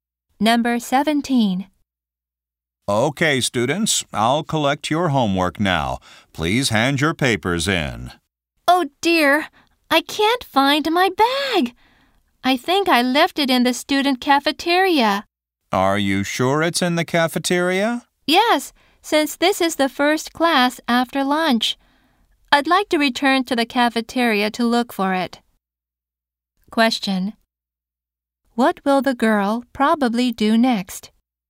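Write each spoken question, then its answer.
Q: Question. What will the girl probably do next?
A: Go back to the cafeteria to look for her bag.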